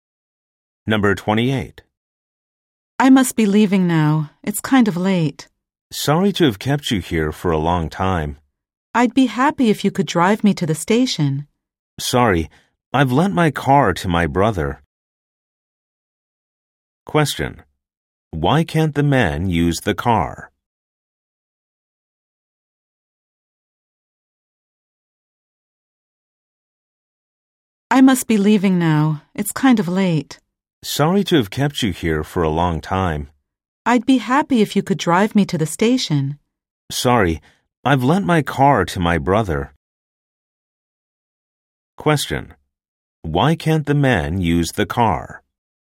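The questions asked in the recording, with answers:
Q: Why can't the man use the car?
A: He lent it to his brother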